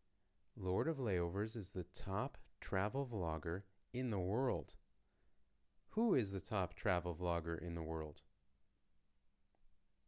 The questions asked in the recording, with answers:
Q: Who is the top travel vlogger in the world?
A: Lord of Layovers. Lord of Layovers is the world's top travel vlogger.